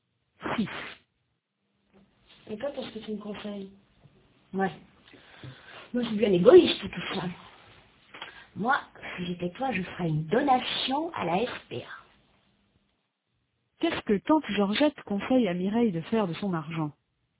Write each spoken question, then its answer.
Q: Qu'est-ce que Tante Georgette conseille à Mireille de faire de son argent ?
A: Elle lui conseille de faire une donation à la SPA.